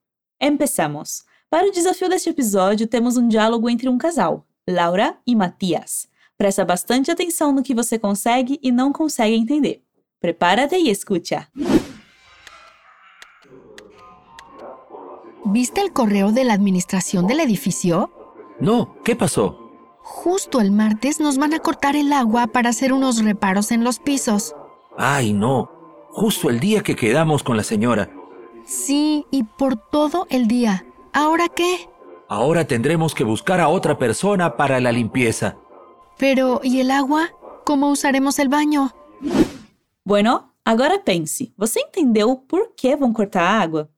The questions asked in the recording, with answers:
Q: ¿Vos entendeu por qué van a cortar agua?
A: E a Laura explica que justo na terça eles vão cortar a água para fazer uns reparos, uns ajustes nos apartamentos.